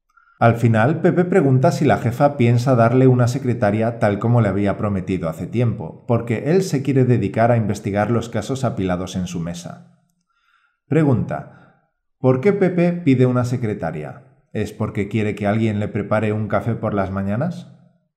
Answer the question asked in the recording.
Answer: No, Pepe pide una secretaria para que haga el trabajo administrativo, como por ejemplo los informes.